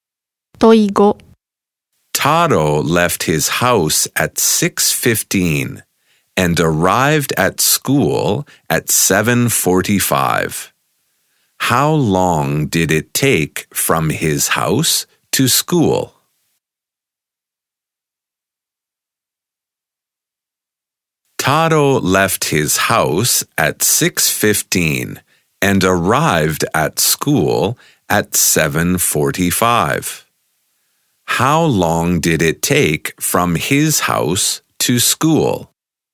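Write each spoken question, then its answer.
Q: How long did it take from his house to school?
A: One hour and thirty minutes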